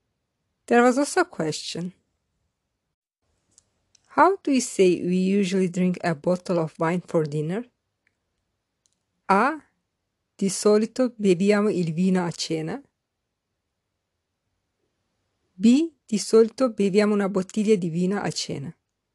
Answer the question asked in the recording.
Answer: The correct answer is B. Di solito beviamo una bottiglia di vino a cena.